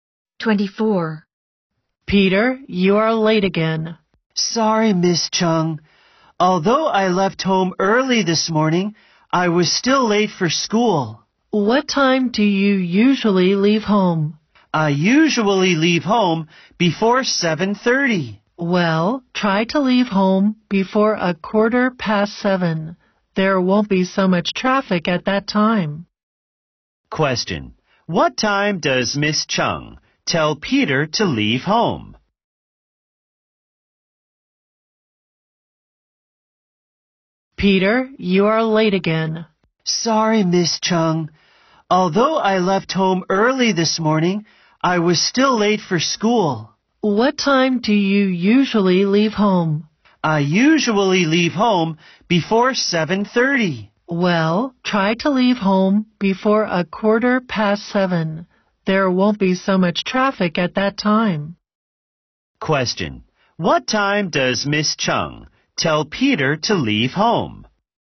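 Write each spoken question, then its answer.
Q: what time does Miss Chung tell Peter to leave home?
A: Before 7:15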